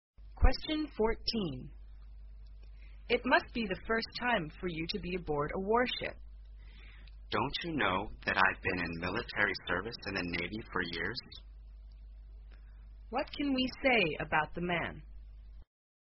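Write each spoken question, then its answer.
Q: What can we say about the man?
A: He has served in the Navy for years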